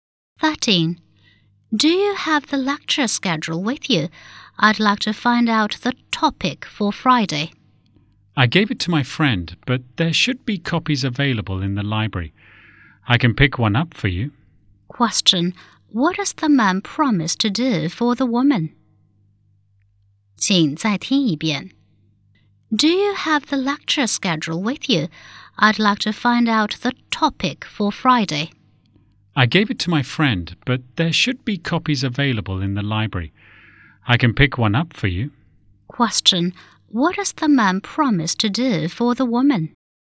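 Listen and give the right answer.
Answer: Pick up a copy of the lecture schedule from the library for her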